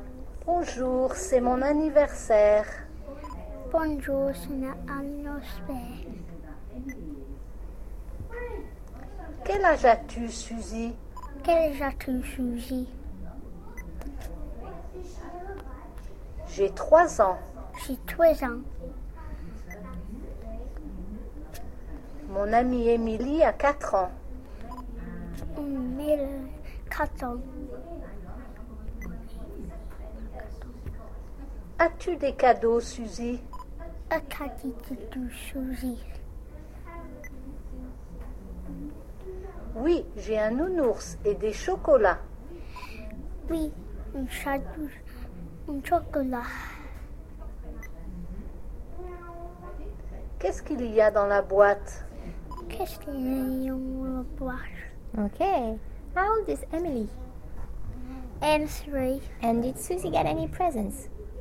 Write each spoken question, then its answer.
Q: And did Suzy get any presents?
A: Yeah.